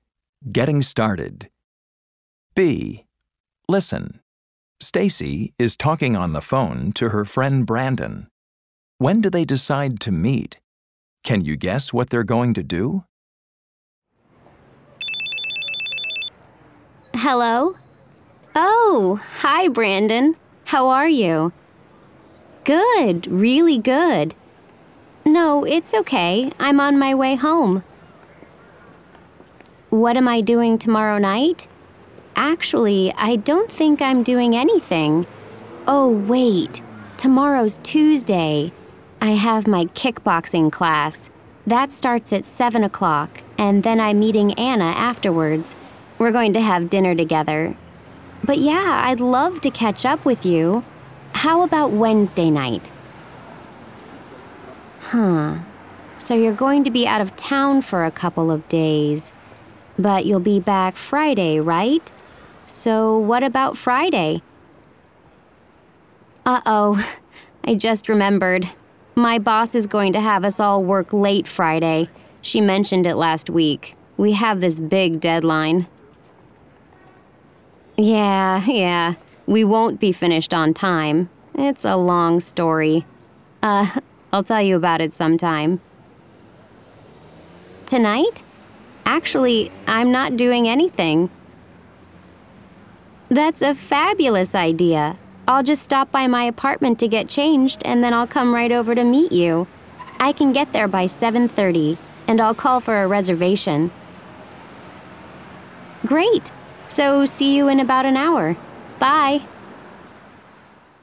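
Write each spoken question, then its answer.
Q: When do they decide to meet?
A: Tonight, at about 7:30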